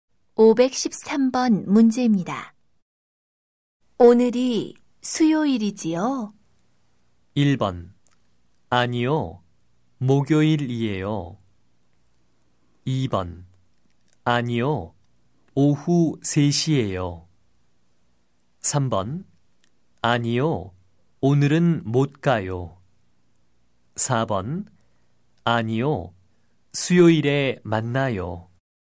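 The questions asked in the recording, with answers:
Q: 오늘이 수요일이지요?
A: 1: 아니요. 목요일이에요.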